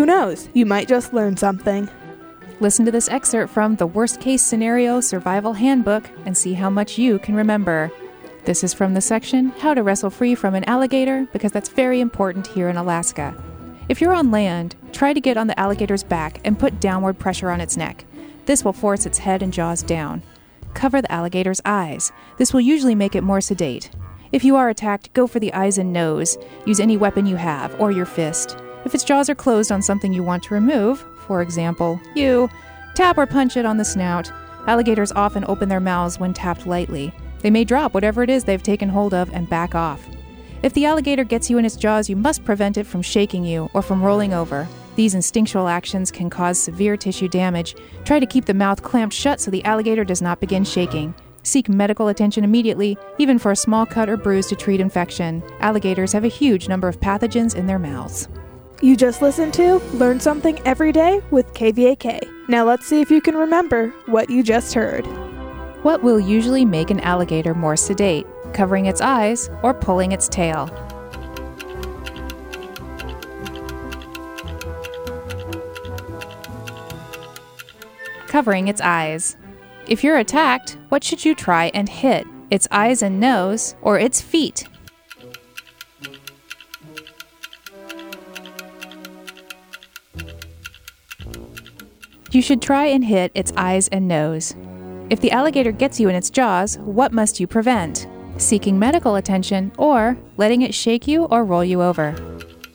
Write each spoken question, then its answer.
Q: What will usually make an alligator more sedate?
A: Covering its eyes.

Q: If you're attacked, what should you try and hit?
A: You should try and hit its eyes and nose.

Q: If the alligator gets you in its jaws, what must you prevent?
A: You should prevent it from shaking you or rolling you over.